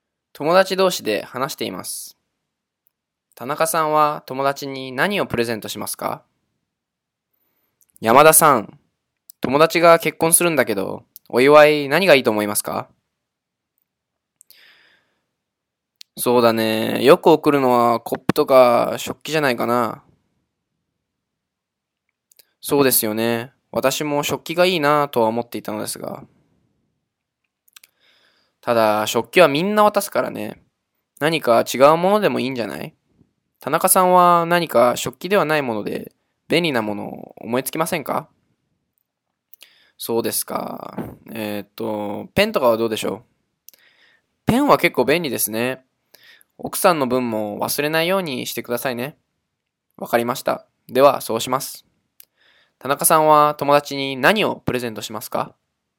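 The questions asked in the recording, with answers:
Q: 田中さんは友達に何をプレゼントしますか?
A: ペン(夫婦二人分)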